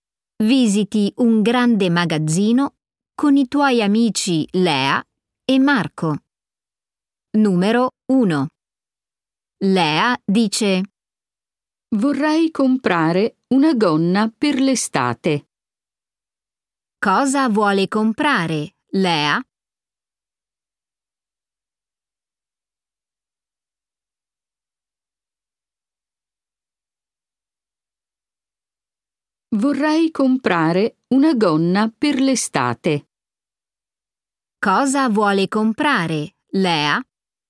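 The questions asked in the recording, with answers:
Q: Cosa vuole comprare, Lea?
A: una gonna per l'estate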